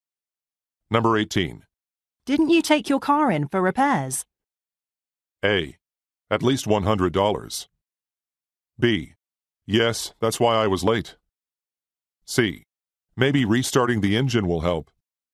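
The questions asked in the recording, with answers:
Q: Didn't you take your car in for repairs?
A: B: Yes, that's why I was late.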